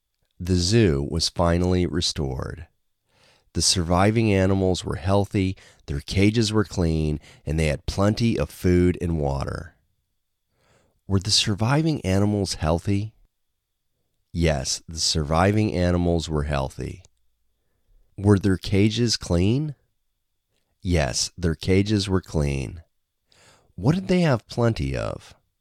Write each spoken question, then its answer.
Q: What did they have plenty of?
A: They had plenty of food and water.